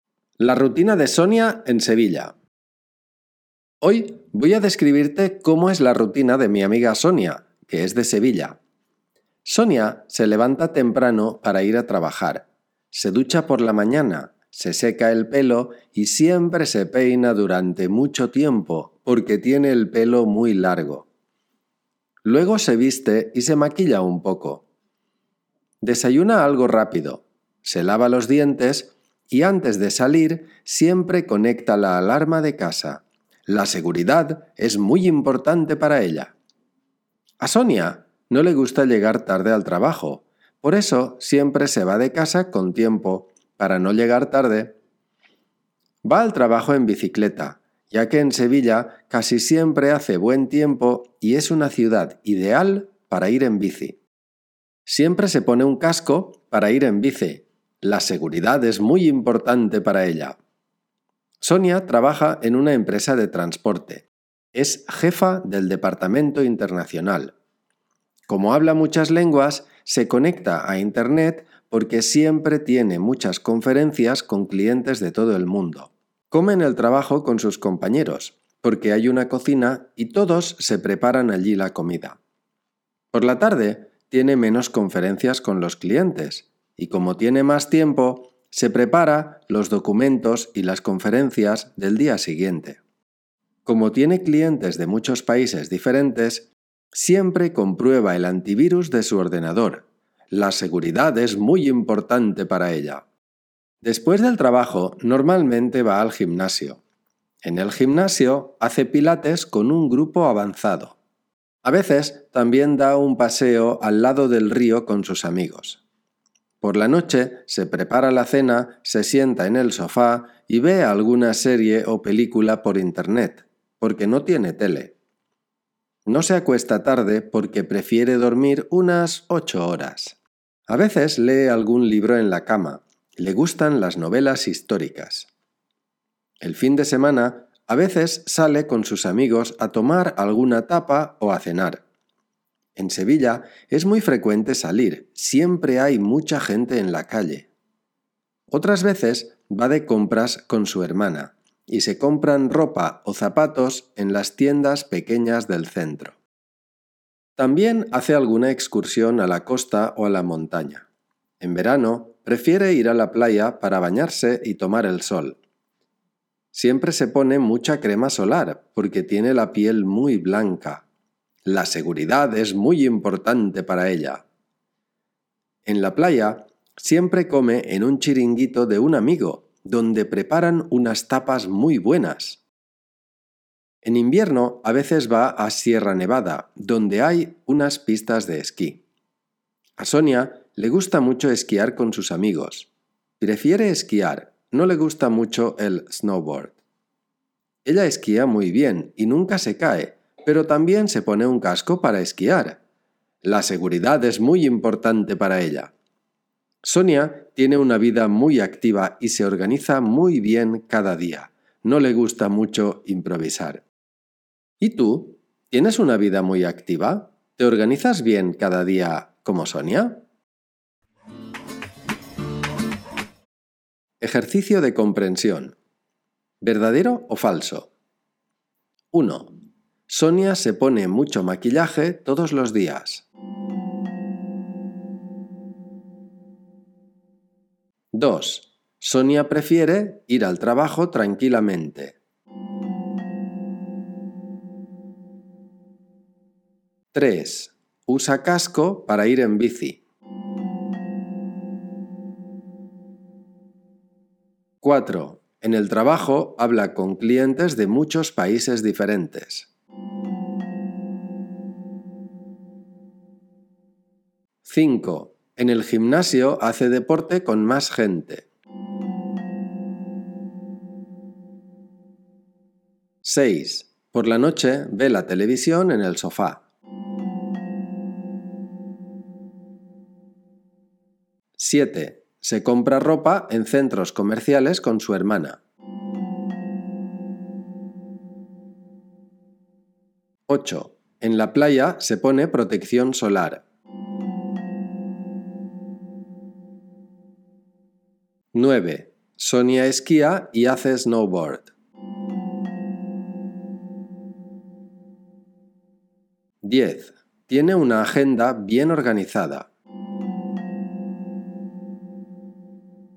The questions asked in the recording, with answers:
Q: Sonia se pone mucho maquillaje todos los días.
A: Falso. Ella se maquilla un poco.

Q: Sonia prefiere ir al trabajo tranquilamente.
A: Verdadero. Siempre se va de casa con tiempo, para no llegar tarde.

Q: Usa casco para ir en bici.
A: Verdadero. Siempre se pone un casco para ir en bici.

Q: En el trabajo habla con clientes de muchos países diferentes.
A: Verdadero. Tiene muchas conferencias con clientes de todo el mundo.

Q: En el gimnasio hace deporte con más gente.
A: Verdadero. Hace pilates con un grupo avanzado.

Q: Por la noche ve la televisión en el sofá.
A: Falso. Se sienta en el sofá y ve alguna serie o película por internet, porque no tiene tele.

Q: Se compra ropa en centros comerciales con su hermana.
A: Falso. Se compran ropa o zapatos en las tiendas pequeñas del centro.

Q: En la playa se pone protección solar.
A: verdadero. Siempre se pone mucha crema solar porque tiene la piel muy blanca.

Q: Sonia esquía y hace snowboard.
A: Falso. Prefiere esquiar. No le gusta mucho el snowboard.

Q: Tiene una agenda bien organizada.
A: Verdadero. Se organiza muy bien cada día.